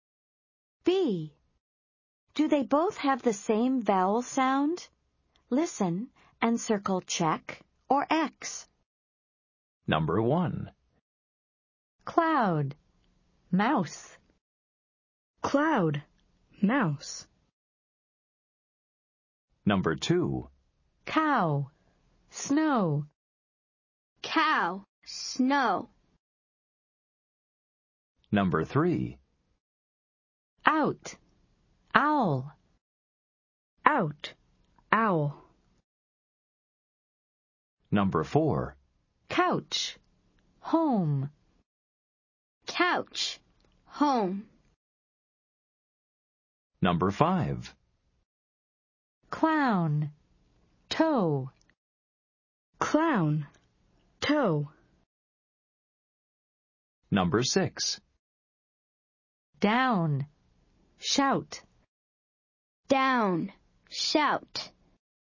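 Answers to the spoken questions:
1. Yes (check)
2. No (X)
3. Yes (check)
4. No (X)
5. No (X)
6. Yes (check)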